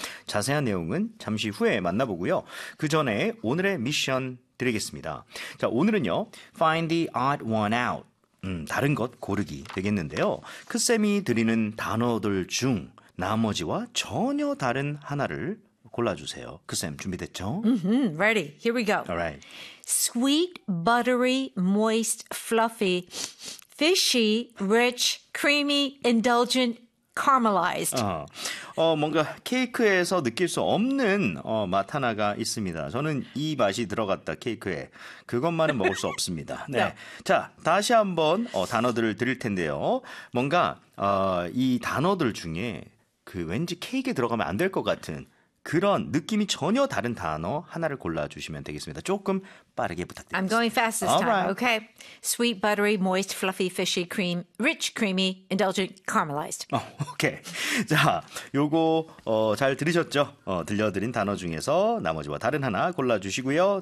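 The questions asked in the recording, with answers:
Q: 크쌤이 드리는 단어들 중 나머지와 전혀 다른 하나를 골라주세요.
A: Fishy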